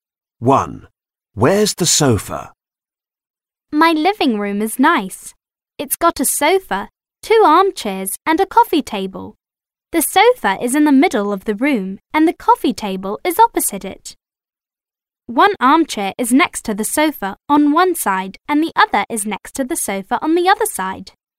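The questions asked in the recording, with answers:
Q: Where's the sofa?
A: In the middle of the room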